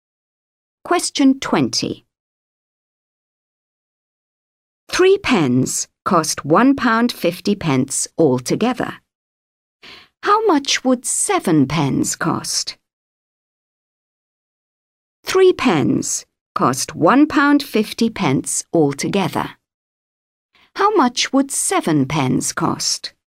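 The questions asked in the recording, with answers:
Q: How much would seven pens cost?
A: £3.50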